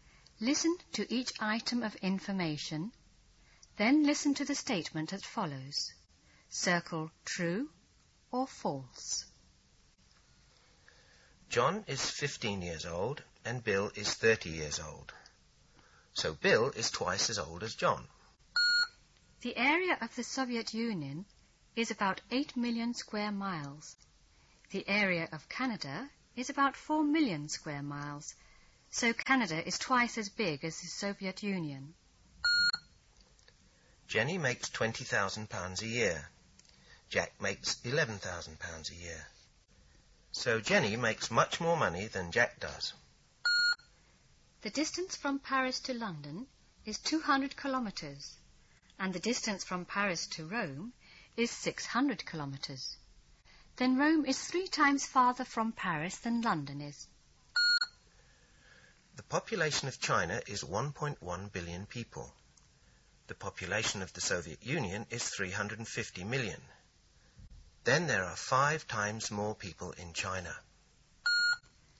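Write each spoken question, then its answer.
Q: So Bill is twice as old as John.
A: True

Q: so Canada is twice as big as the Soviet Union.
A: False

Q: So Jenny makes much more money than Jack does.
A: True

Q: Then Rome is 3 times farther from Paris than London is.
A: True

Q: Then there are 5 times more people in China.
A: False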